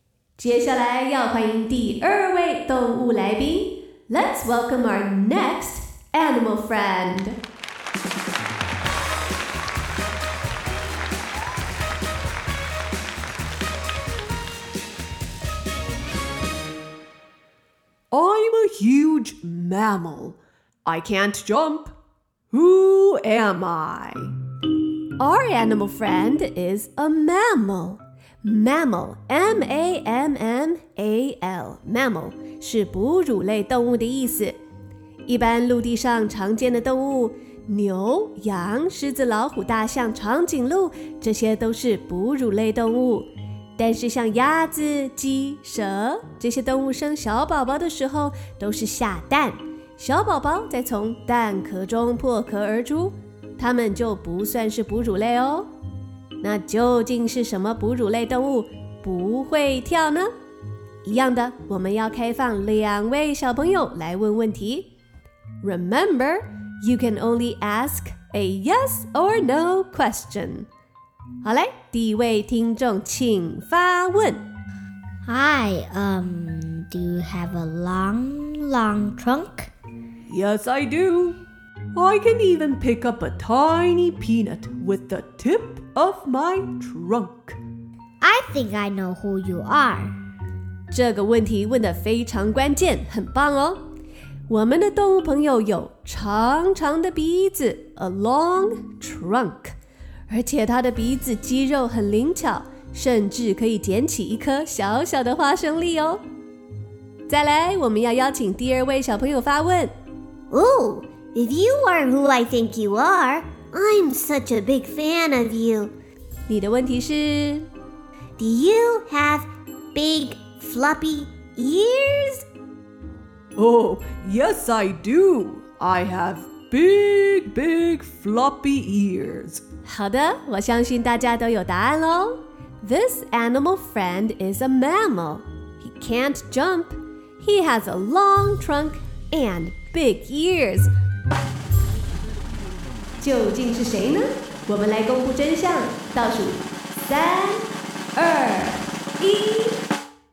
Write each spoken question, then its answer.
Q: Who am I?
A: I am an elephant!